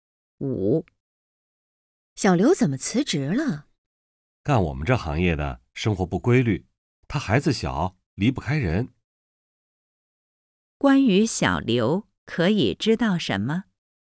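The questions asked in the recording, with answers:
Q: 关于小刘,可以知道什么?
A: 他孩子小,离不开人,而这行业生活不规律,所以辞职了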